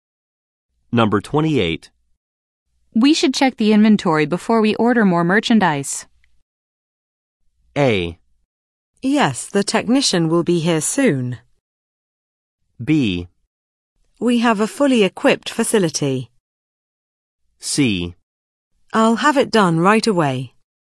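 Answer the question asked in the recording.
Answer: C: I'll have it done right away.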